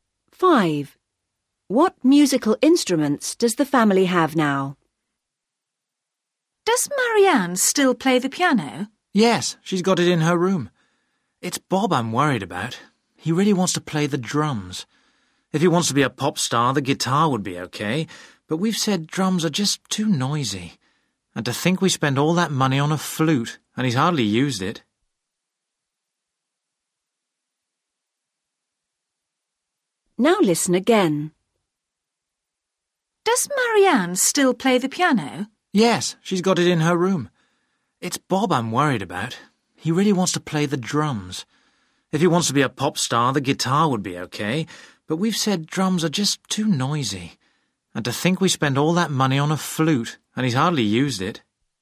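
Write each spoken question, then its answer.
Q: What musical instruments does the family have now?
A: a piano and a flute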